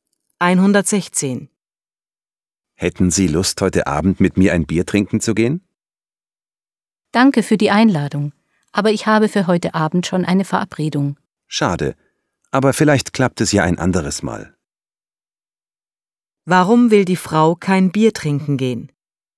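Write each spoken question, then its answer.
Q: Warum will die Frau kein Bier trinken gehen?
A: Sie hat für heute Abend schon eine Verabredung.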